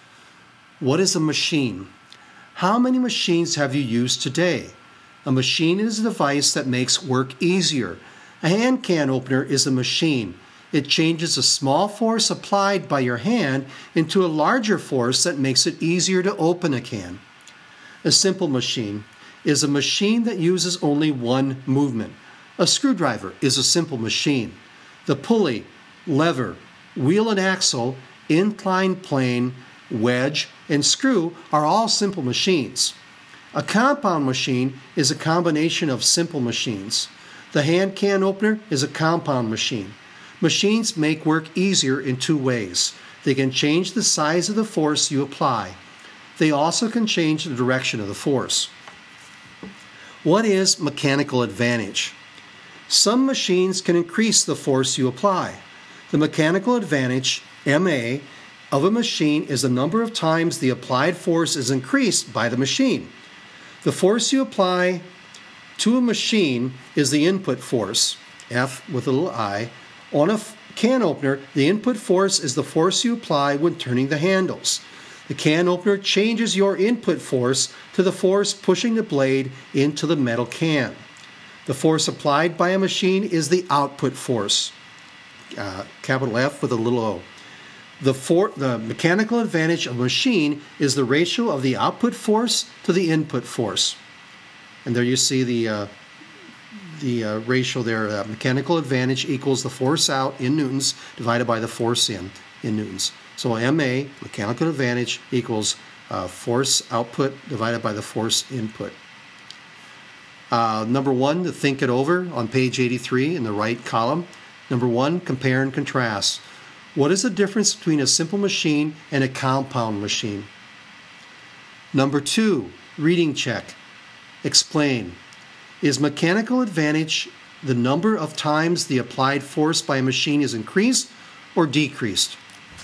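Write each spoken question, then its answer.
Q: What is the difference between a simple machine and a compound machine?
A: A simple machine uses only one movement; a compound machine is a combination of simple machines.

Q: Is mechanical advantage the number of times the applied force by a machine is increased or decreased?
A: Increased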